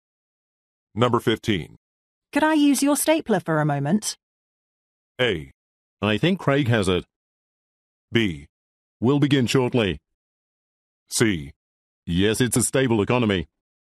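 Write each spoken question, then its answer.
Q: Could I use your stapler for a moment?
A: A: I think Craig has it.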